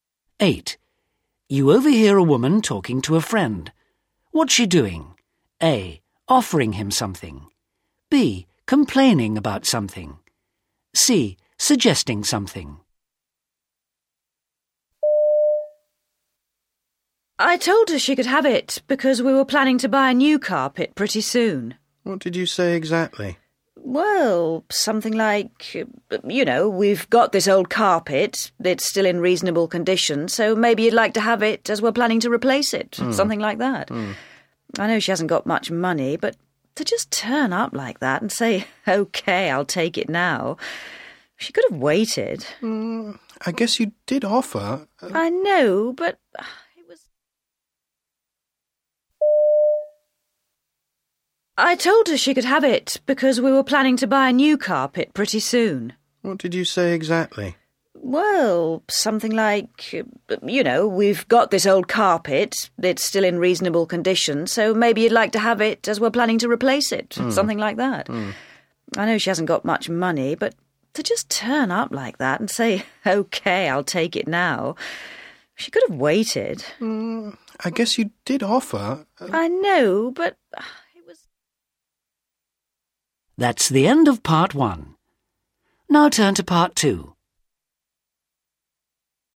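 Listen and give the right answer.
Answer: B: Complaining about something.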